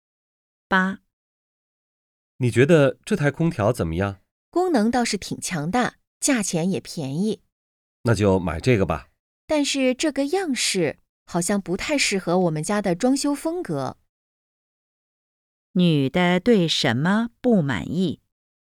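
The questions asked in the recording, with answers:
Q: 女的对什么不满意?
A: 空调的样式不适合家里的装修风格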